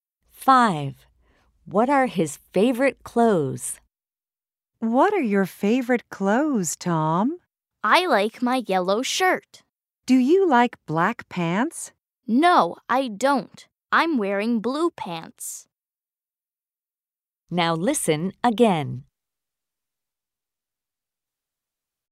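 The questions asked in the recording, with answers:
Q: What are his favorite clothes?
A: His yellow shirt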